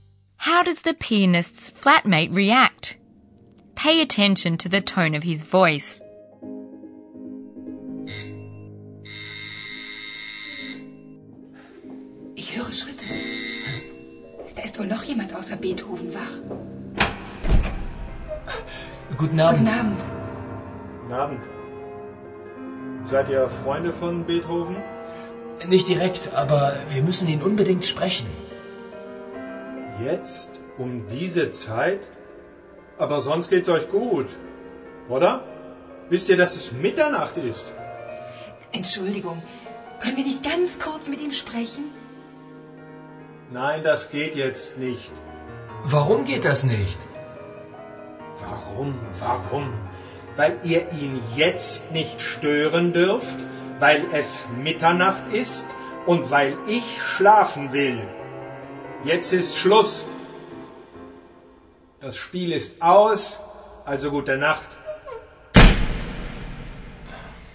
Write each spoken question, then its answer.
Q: How does the pianist's flatmate react?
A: Were you able to hear how the flatmate gradually gets angrier and angrier?